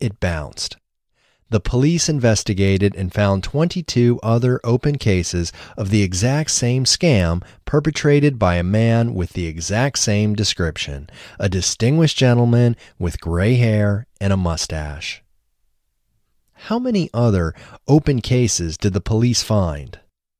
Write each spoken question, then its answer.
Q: How many other open cases did the police find?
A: The police found 22 other open cases.